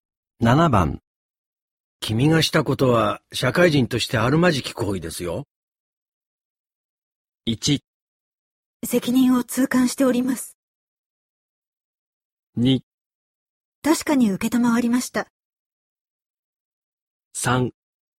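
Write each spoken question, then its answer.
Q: 君がしたことは社会人としてあるまじき行為ですよ。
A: 1: 責任を痛感しております。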